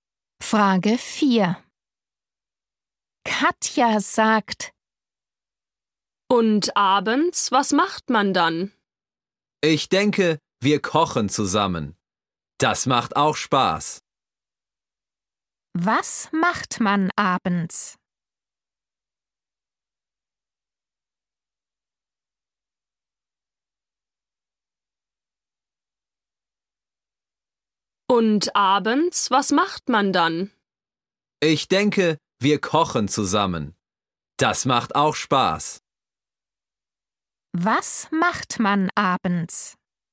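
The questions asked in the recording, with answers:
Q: Was macht man abends?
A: Man kocht zusammen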